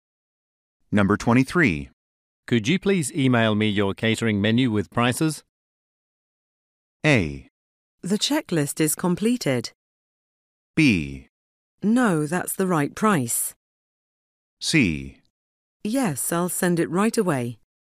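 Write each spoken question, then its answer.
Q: Could you please email me your catering menu with prices?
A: C: Yes, I'll send it right away.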